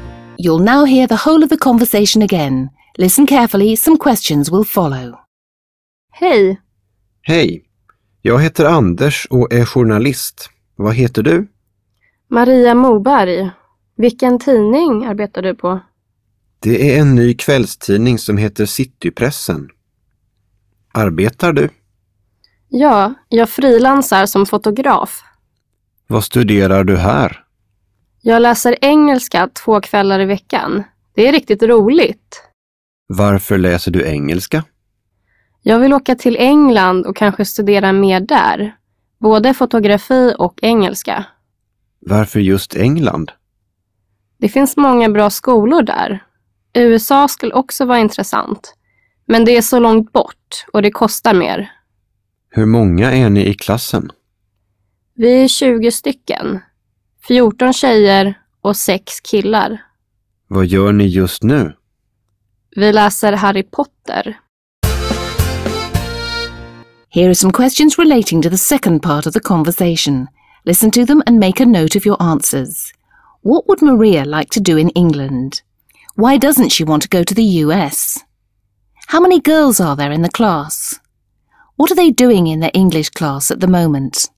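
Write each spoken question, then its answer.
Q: What would Maria like to do in England?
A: Study more there, both photography and English

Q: Why doesn't she want to go to the US?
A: It's so far away and it costs more

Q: How many girls are there in the class?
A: 14

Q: What are they doing in their English class at the moment?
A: Reading Harry Potter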